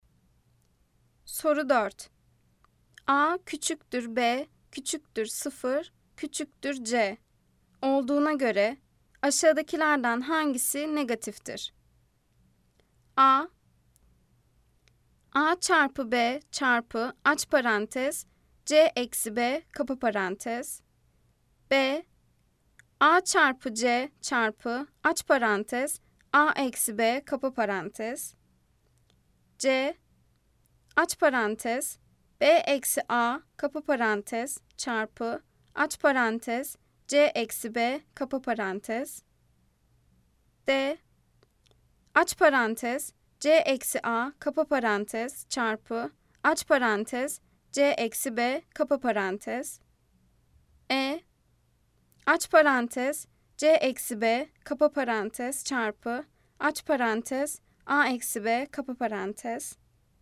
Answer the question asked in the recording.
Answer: Cevap Edirne, aç parantez, C eksi B, kapa parantez, çarpı, aç parantez, A eksi B, kapa parantez.